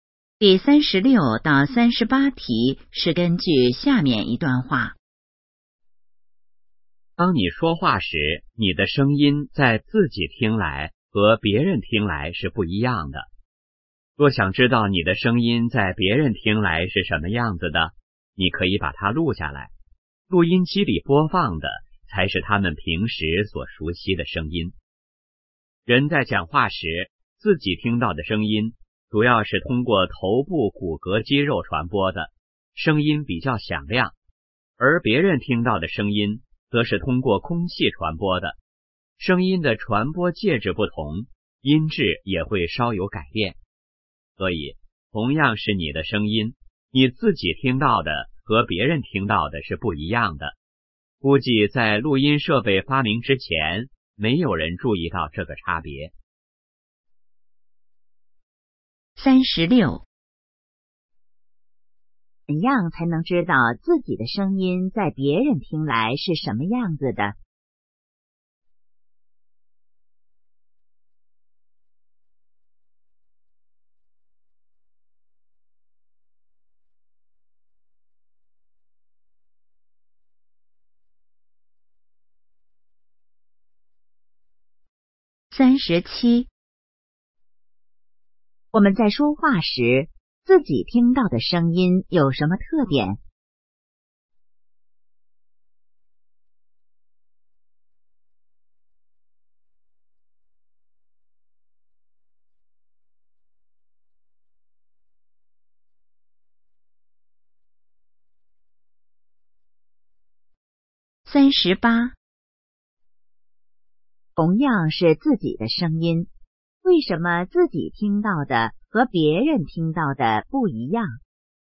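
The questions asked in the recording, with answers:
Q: 怎样才能知道自己的声音在别人听来是什么样子的?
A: 把声音录下来

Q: 我们在说话时,自己听到的声音有什么特点?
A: 比较响亮

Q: 同样是自己的声音,为什么自己听到的和别人听到的不一样?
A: 声音的传播介质不同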